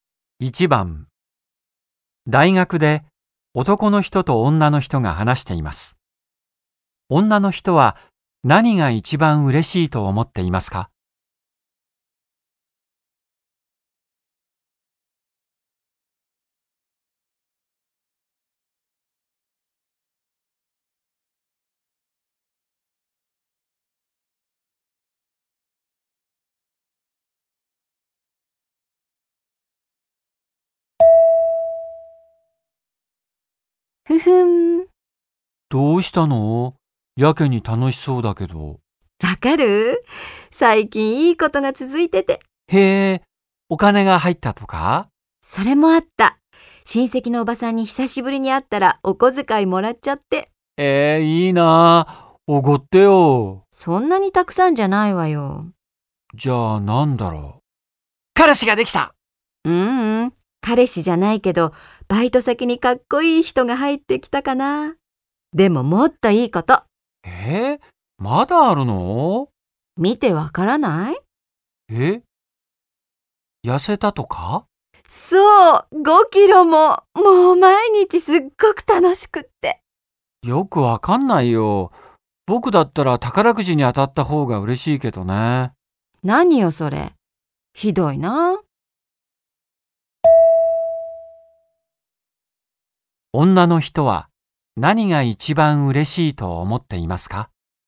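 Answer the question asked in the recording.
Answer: 5キロ痩せたこと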